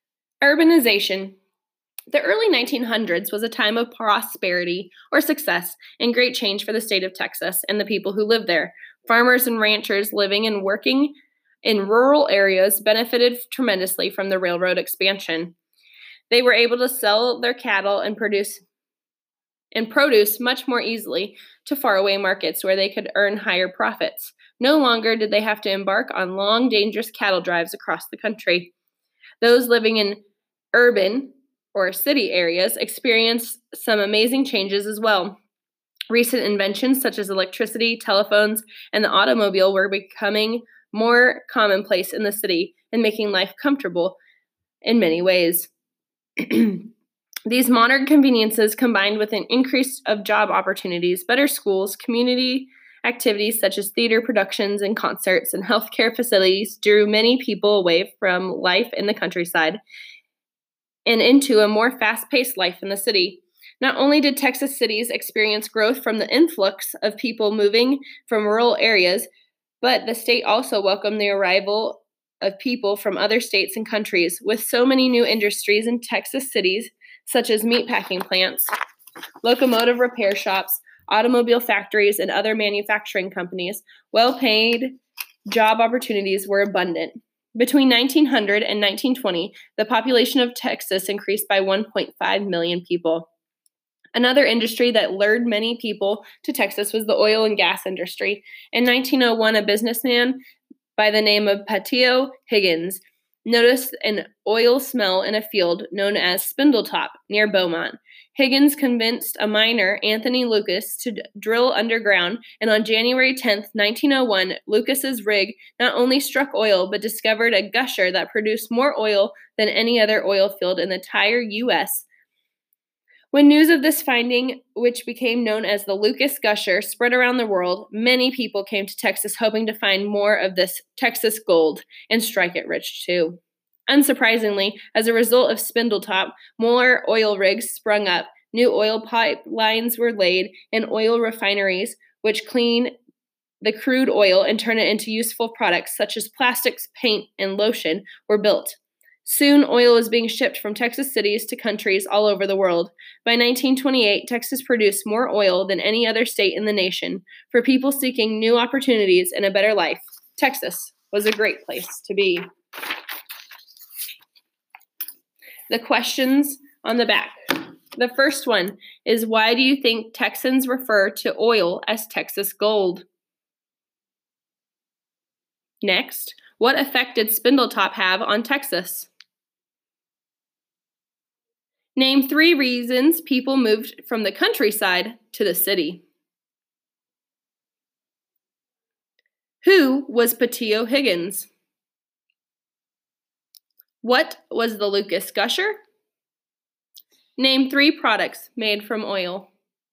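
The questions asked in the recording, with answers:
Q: What effect did Spindletop have on Texas?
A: Many people came to Texas, more oil rigs, pipelines and refineries were built, and oil was shipped worldwide

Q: Name three reasons people moved from the countryside to the city.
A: Modern conveniences, more jobs, better schools, community activities, healthcare

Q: Who was Pattillo Higgins?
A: A businessman who noticed an oil smell at Spindletop near Beaumont

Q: What was the Lucas Gusher?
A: The oil gusher struck by Anthony Lucas at Spindletop on January 10, 1901, which produced more oil than any other U.S. oil field

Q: Name three products made from oil.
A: Plastics, paint, and lotion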